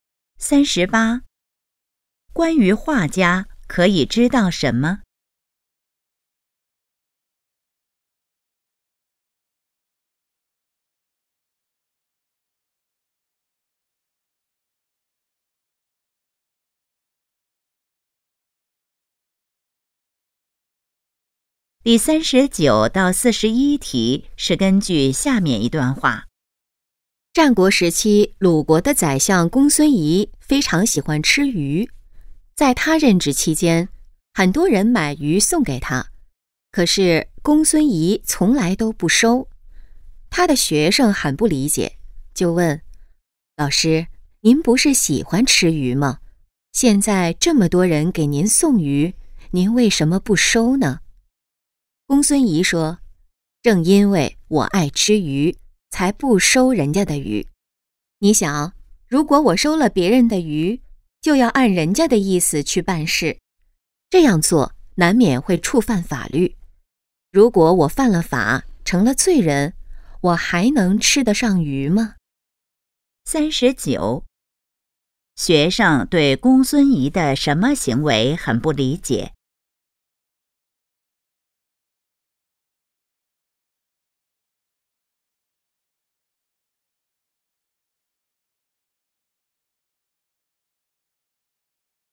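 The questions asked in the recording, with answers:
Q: 学生对公孙仪的什么行为很不理解?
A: 喜欢吃鱼却不收别人送的鱼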